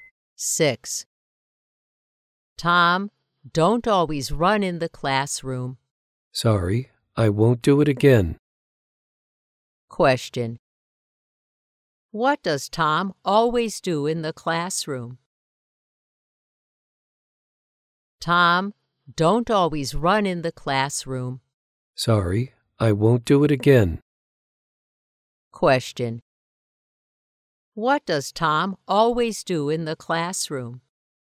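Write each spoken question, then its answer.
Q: What does Tom always do in the classroom?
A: He runs in the classroom.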